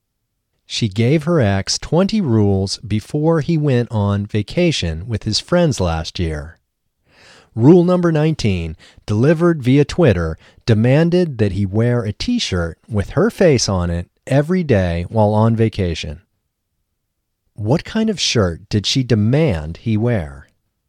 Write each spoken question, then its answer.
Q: What kind of shirt did she demand he wear?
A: She demanded he wear a t-shirt with her face on it.